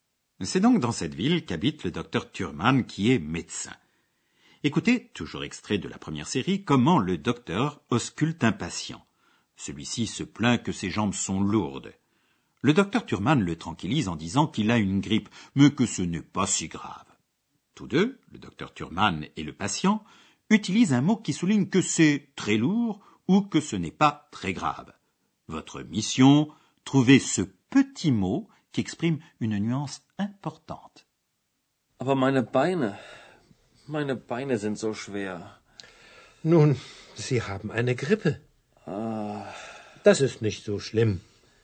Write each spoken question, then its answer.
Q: Votre mission, trouver ce petit mot qui exprime une nuance importante.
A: Zo, si, si lourd, si grave.